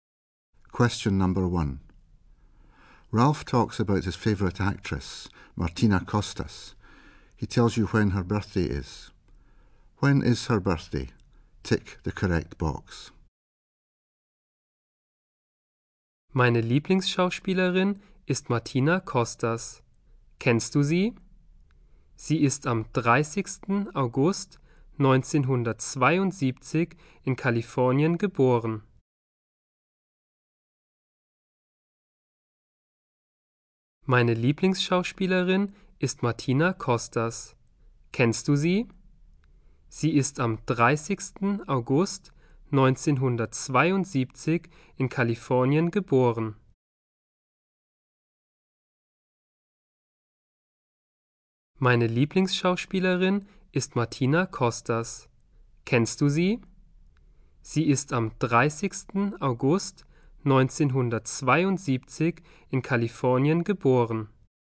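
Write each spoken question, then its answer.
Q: When is her birthday?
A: 30 August (1972)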